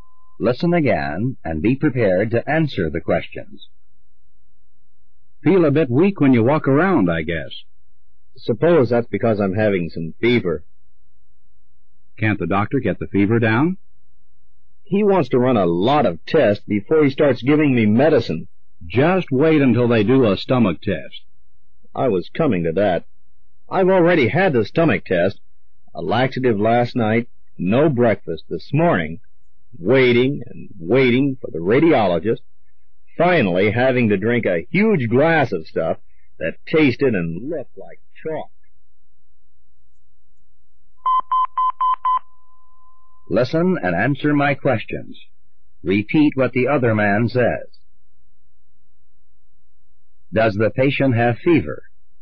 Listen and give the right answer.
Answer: Yes, he does.